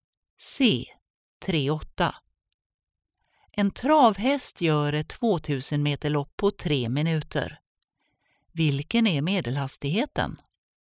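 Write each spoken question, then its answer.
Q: Vilken är medelhastigheten?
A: ca 11 m/s (40 km/h)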